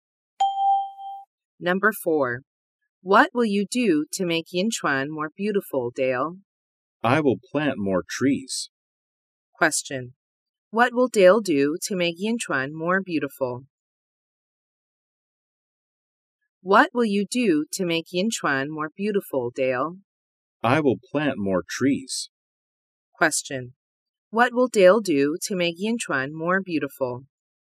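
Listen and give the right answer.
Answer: Plant more trees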